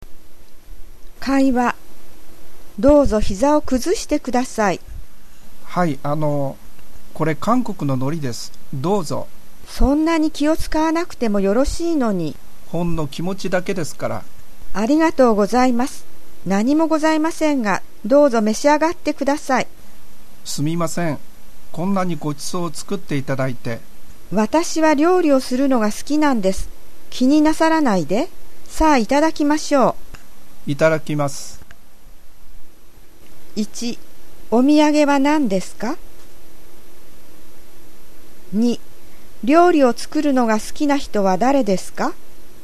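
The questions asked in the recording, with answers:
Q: お土産は何ですか?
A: 韓国の海苔

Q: 料理を作るのが好きな人は誰ですか?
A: 招いた人(料理を出した家の人)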